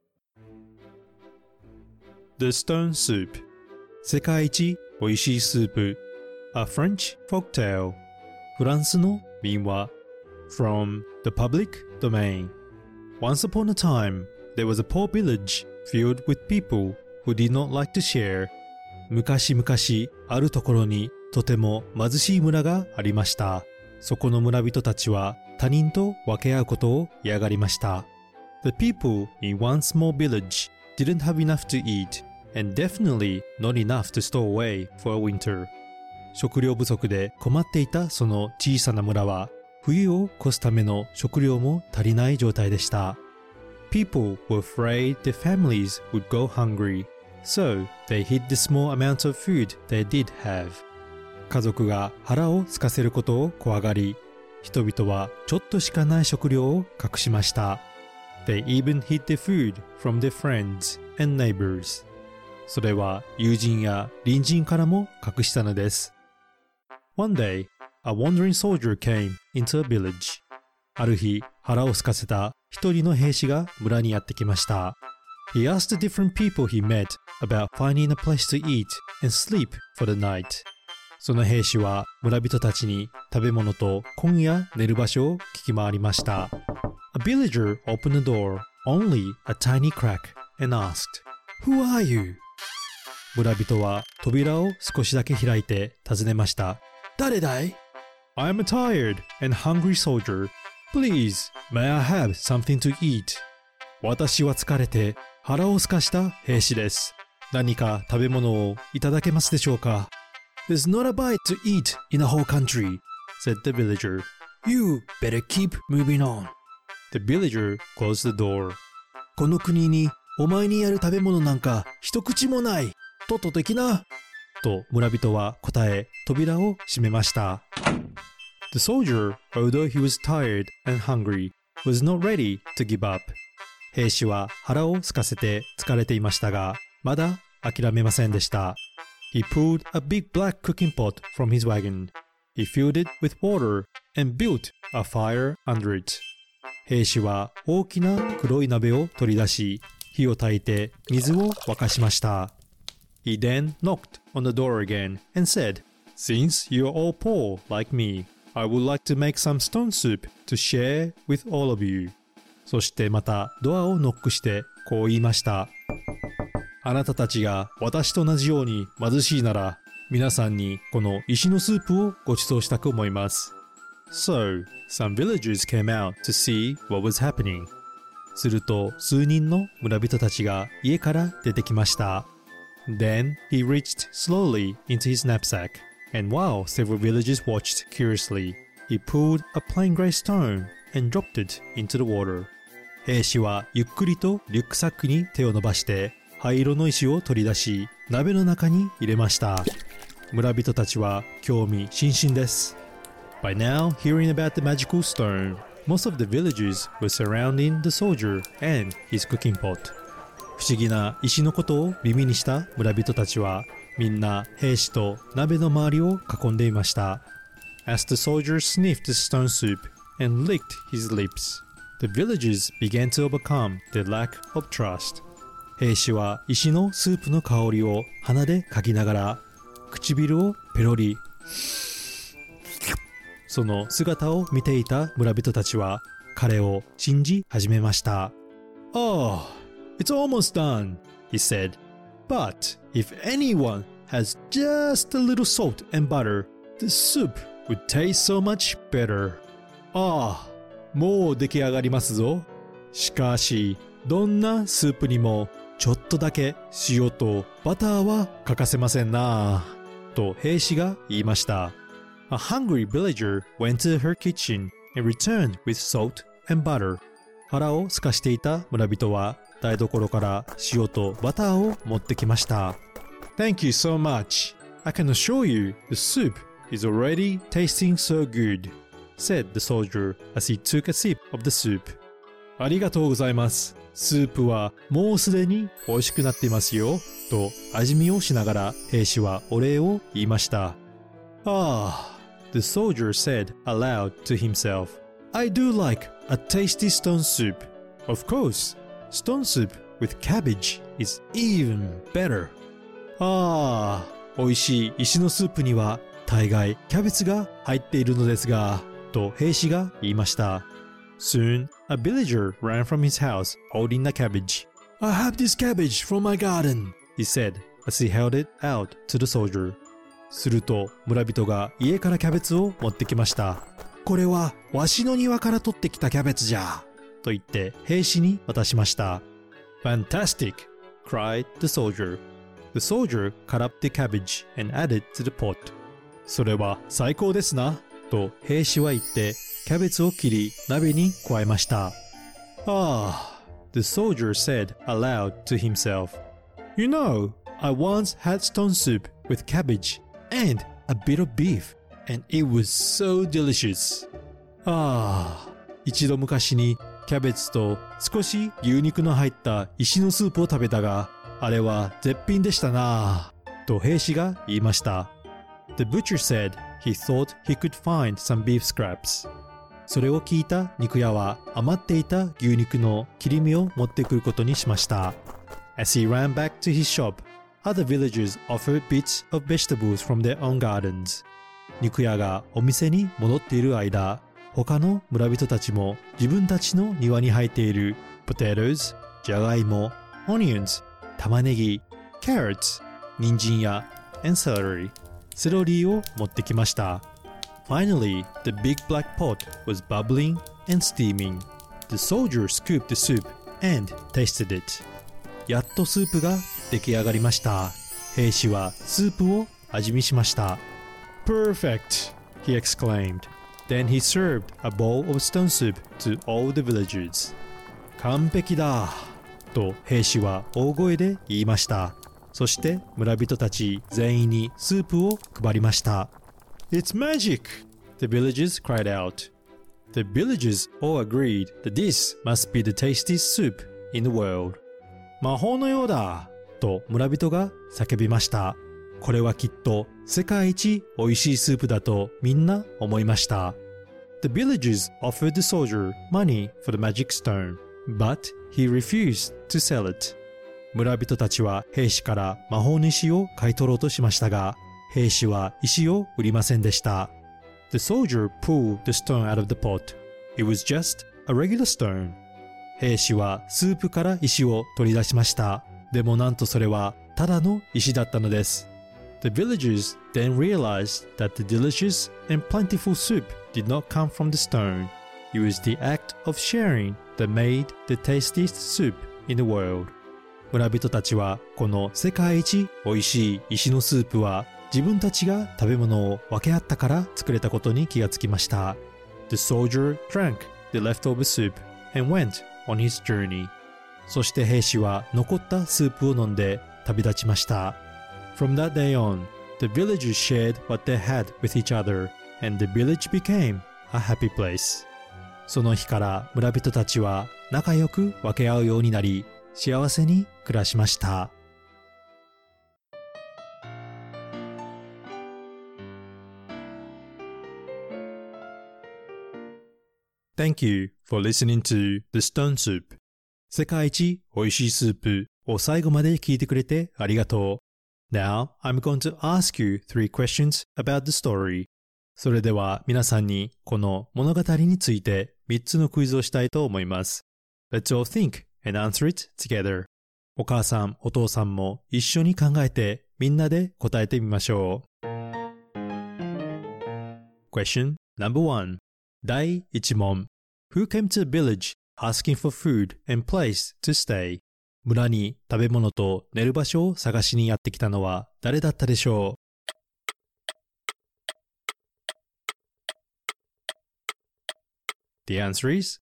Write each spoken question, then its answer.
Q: Who came to the village asking for food and place to stay?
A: 答えは He was a soldier 兵士です。